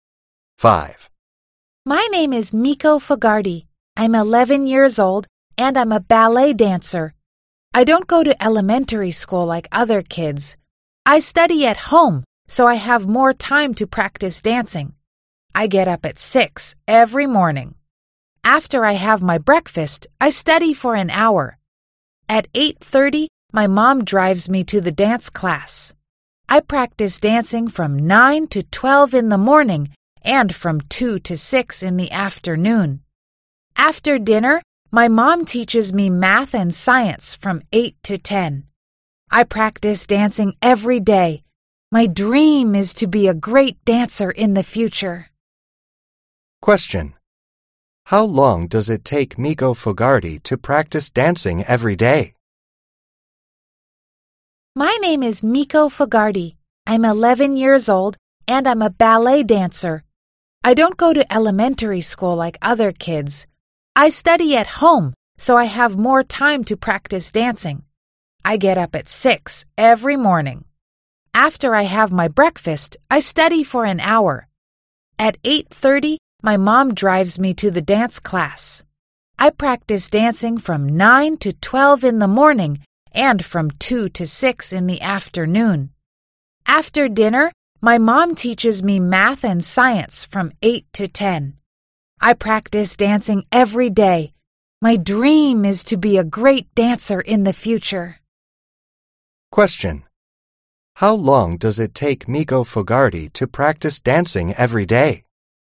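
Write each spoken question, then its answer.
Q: How long does it take Miko Fogarty to practice dancing every day?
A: Seven hours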